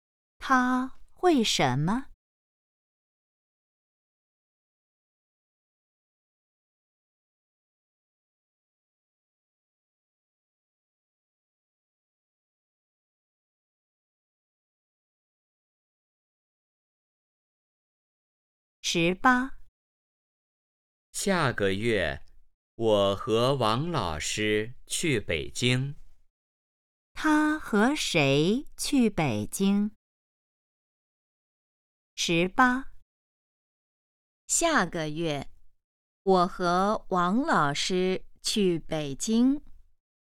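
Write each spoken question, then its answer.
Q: 他和谁去北京?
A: 王老师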